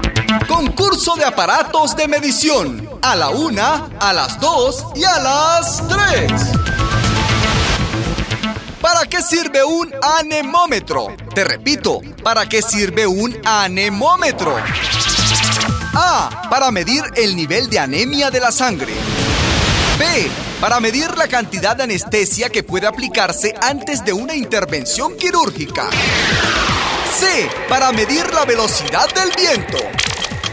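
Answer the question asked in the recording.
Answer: C: Para medir la velocidad del viento.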